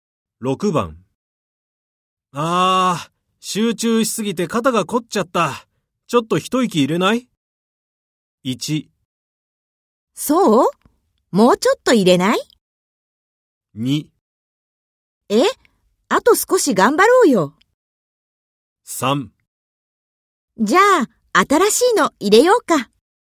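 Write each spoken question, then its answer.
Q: ああ、集中しすぎて肩が凝っちゃった。ちょっと一息入れない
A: 2: え?あと少し頑張ろうよ。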